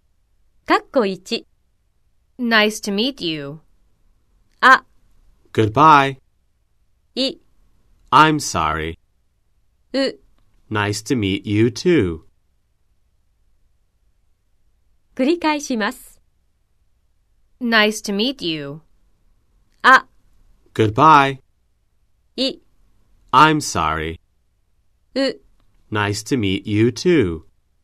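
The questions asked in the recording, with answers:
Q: Nice to meet you.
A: う: Nice to meet you too.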